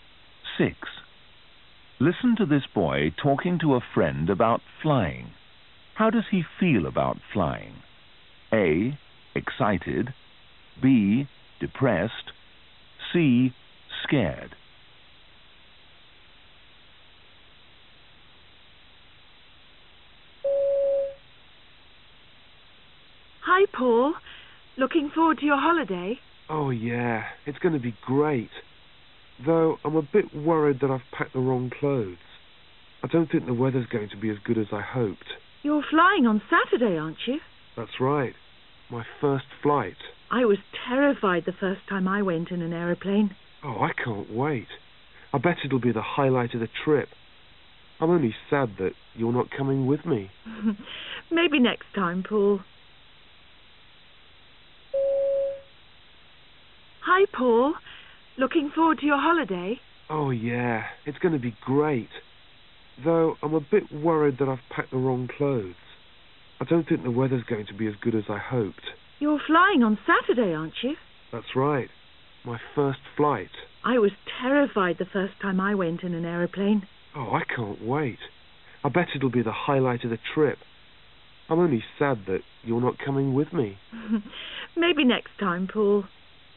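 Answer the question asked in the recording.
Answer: A: Excited.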